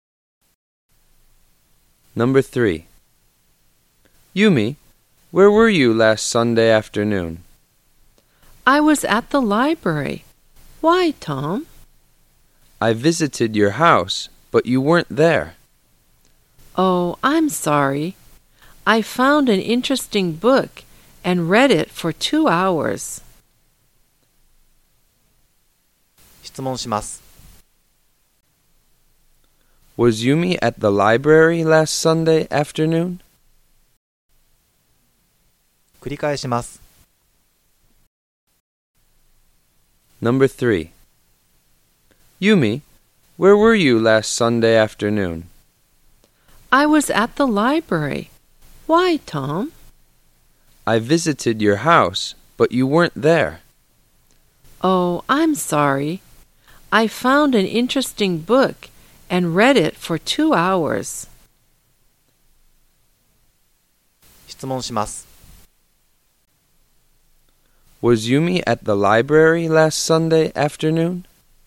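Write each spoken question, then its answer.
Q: Was Yumi at the library last Sunday afternoon?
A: Yes, she was.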